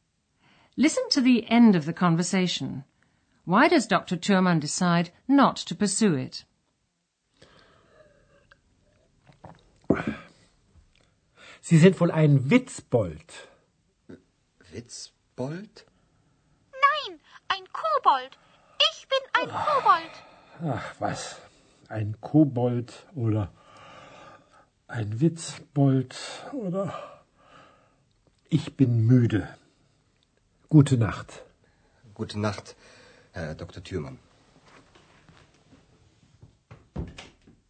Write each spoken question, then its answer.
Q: Why does Dr. Thurmann decide not to pursue it?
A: Dr. Thürmann ends the conversation because he's tired.